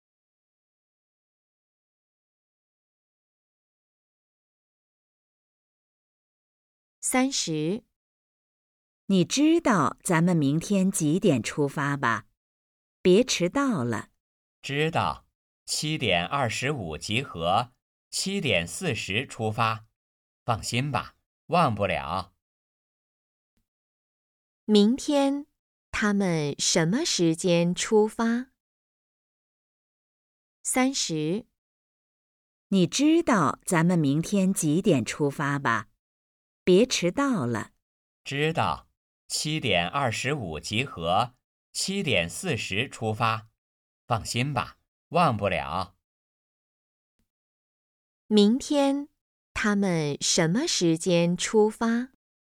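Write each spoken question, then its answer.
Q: 明天,他们什么时间出发?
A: 7:40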